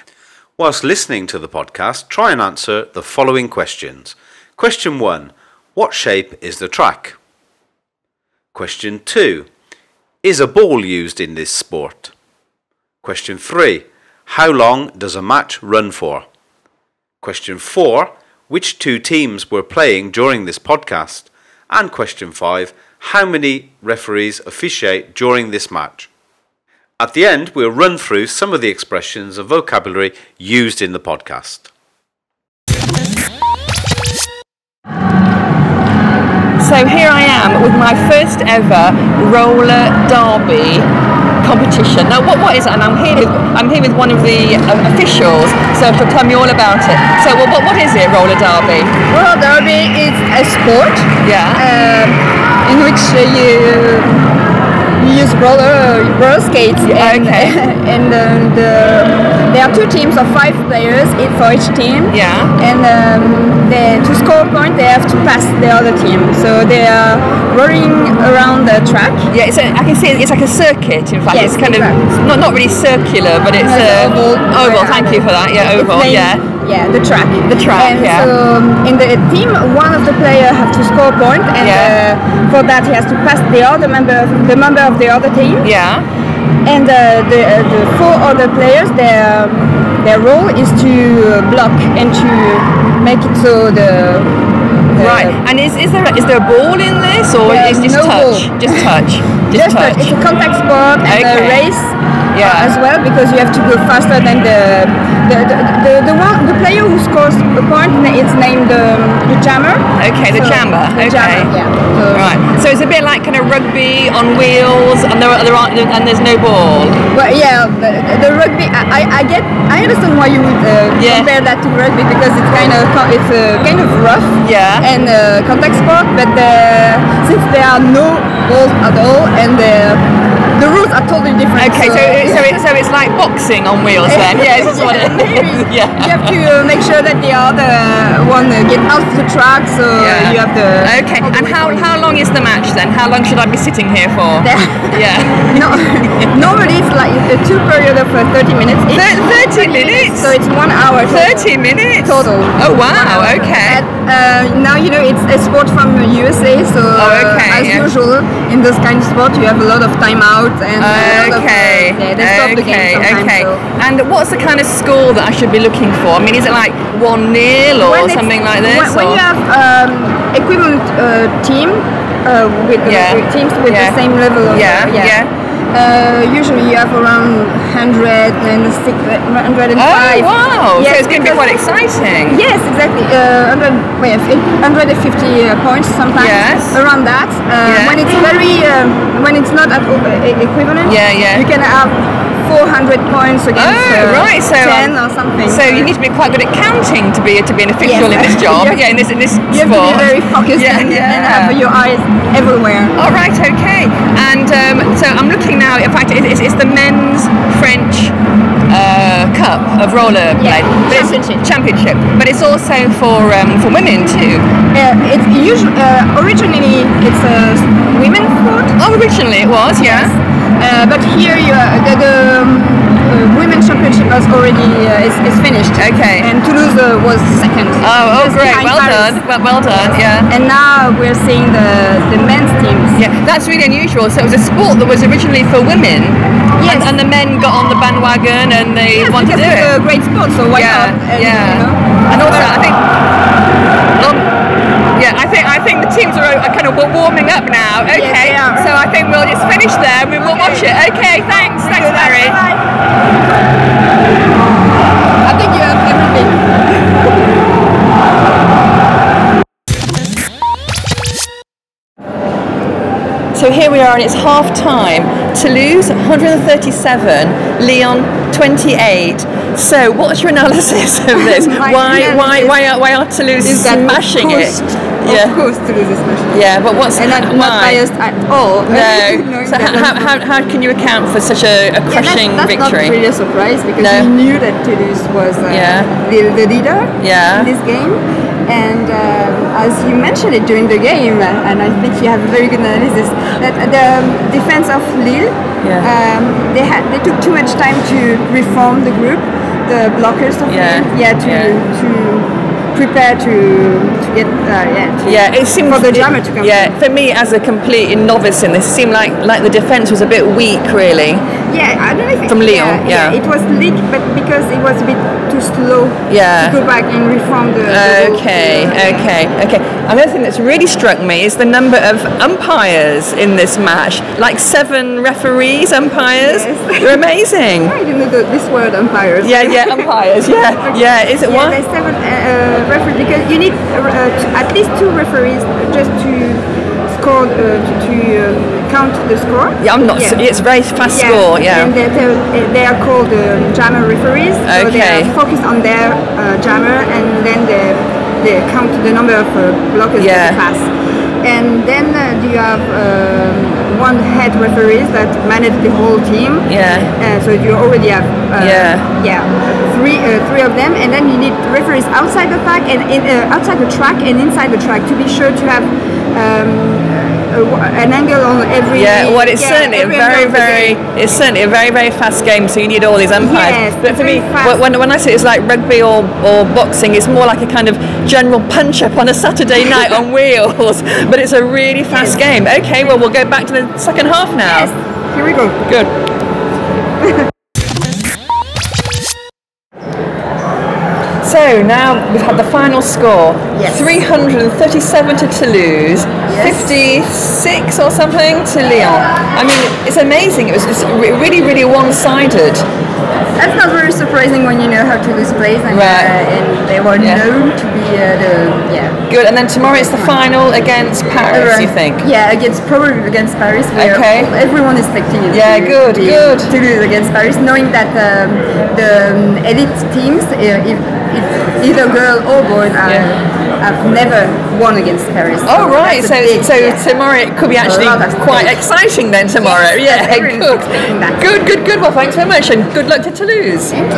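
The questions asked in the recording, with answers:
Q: What shape is the track?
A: Oval

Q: Is a ball used in this sport?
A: No

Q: How long does a match run for?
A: One hour (two periods of 30 minutes)

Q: How many referees officiate during this match?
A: Seven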